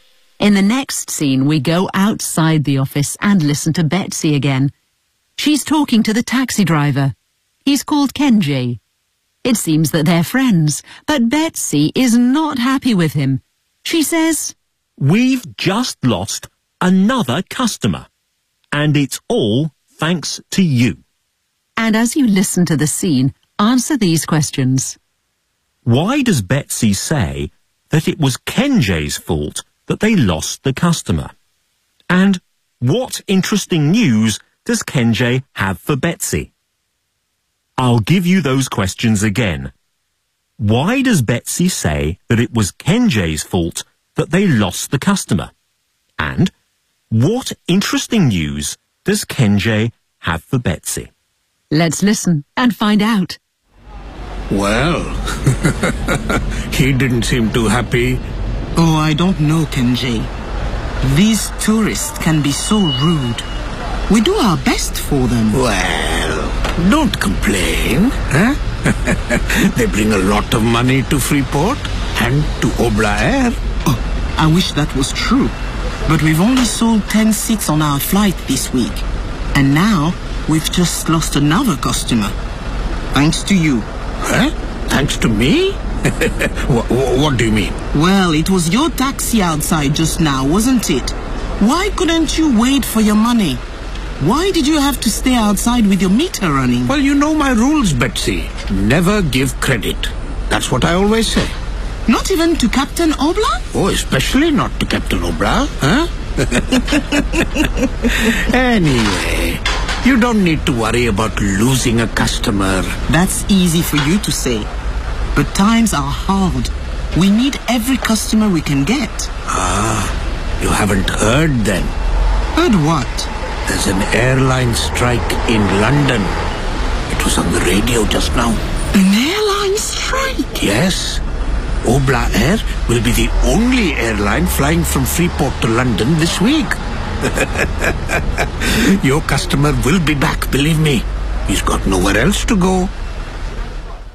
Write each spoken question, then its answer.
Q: Why does Betsy say that it was Kenji's fault that they lost the customer?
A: Because Kenji caused trouble for the captain, as he didn't wait for him to pay his taxi fare.

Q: And what interesting news does Kenji have for Betsy?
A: There's an airline strike in London.